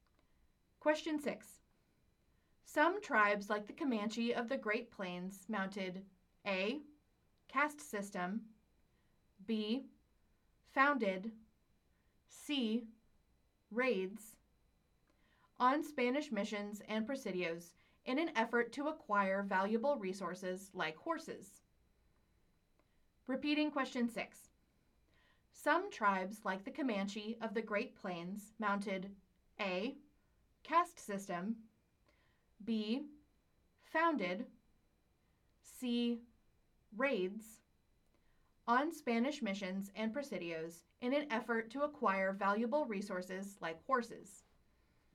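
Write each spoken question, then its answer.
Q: Some tribes like the Comanche of the Great Plains mounted A. caste system, B. founded, C. raids on Spanish missions and presidios in an effort to acquire valuable resources like horses.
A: C: raids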